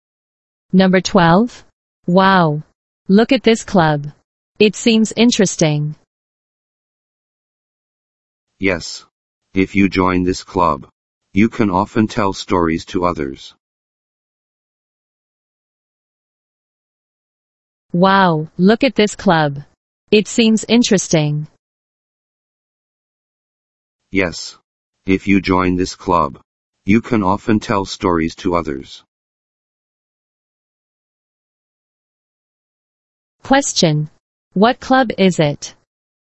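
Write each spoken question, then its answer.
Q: Question. What club is it?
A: A storytelling club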